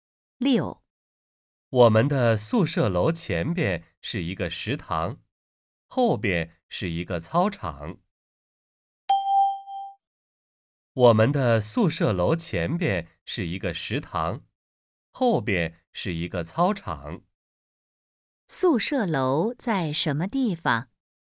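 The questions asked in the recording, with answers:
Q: 宿舍楼在什么地方?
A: 在食堂后边,操场前边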